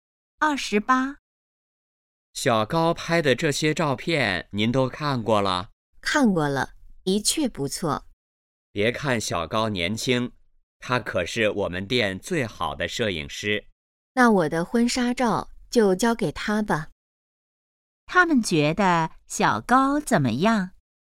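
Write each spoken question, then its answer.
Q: 他们觉得小高怎么样?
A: 照片拍得好,是最好的摄影师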